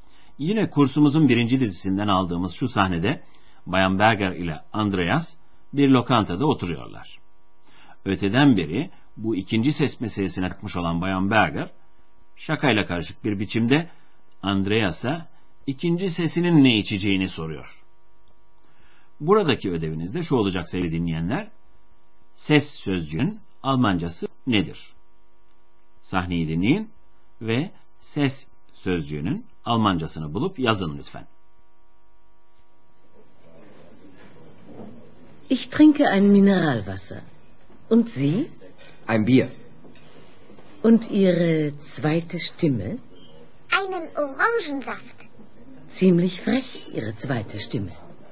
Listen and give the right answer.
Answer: Ses sözcüğünün Almanca karşılığı stimme.